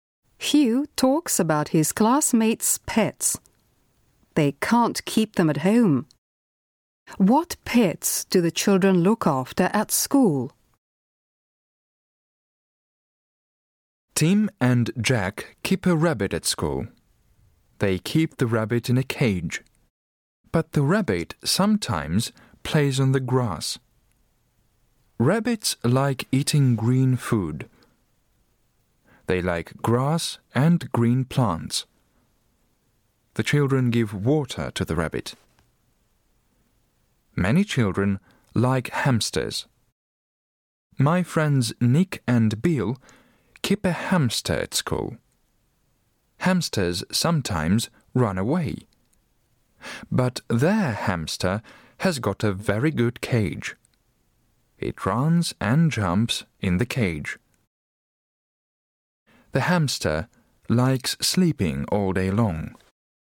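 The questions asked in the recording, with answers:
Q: What pets do the children look after at school?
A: A rabbit and a hamster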